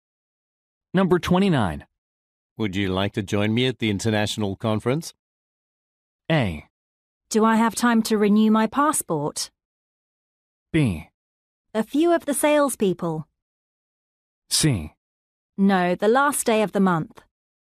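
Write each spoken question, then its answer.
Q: Would you like to join me at the international conference?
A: A: Do I have time to renew my passport?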